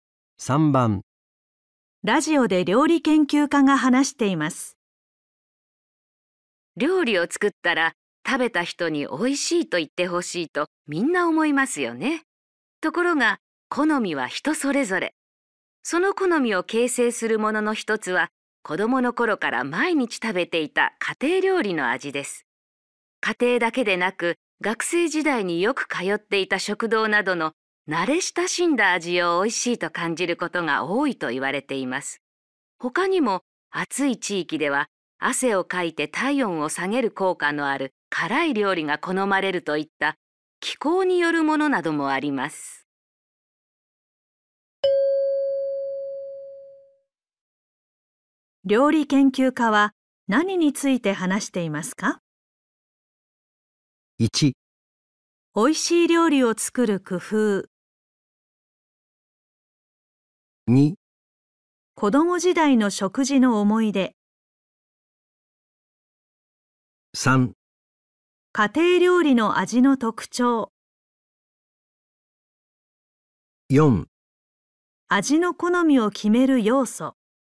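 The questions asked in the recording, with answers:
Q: 料理研究家は何について話していますか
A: 4: 味の好みを決める要素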